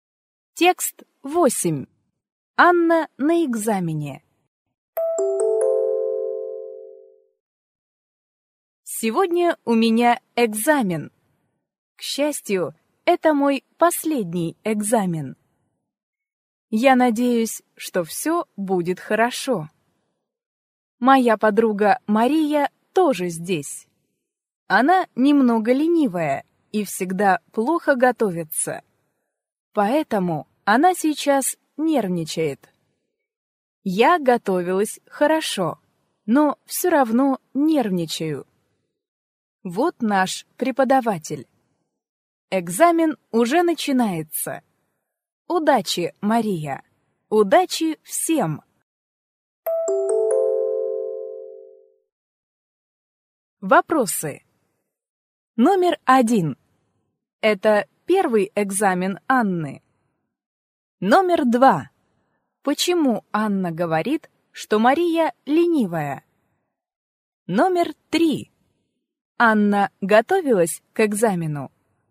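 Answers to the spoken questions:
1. Нет, это её последний экзамен.
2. Потому что Мария всегда плохо готовится.
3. Да, она готовилась хорошо.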